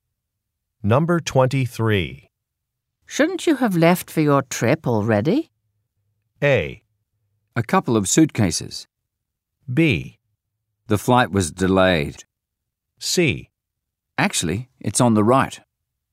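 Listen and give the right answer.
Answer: B: The flight was delayed.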